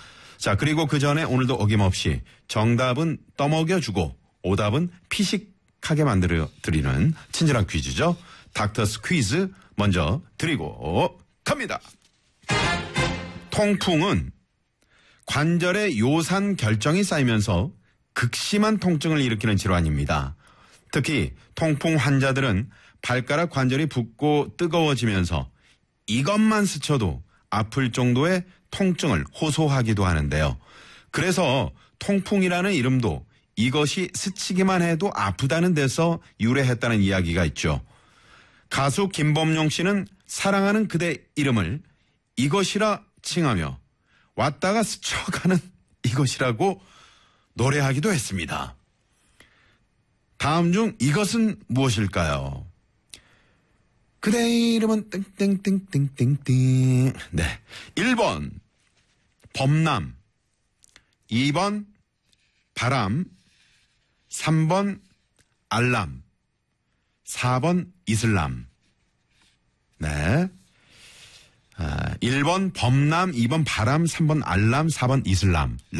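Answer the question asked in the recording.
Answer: 2: 바람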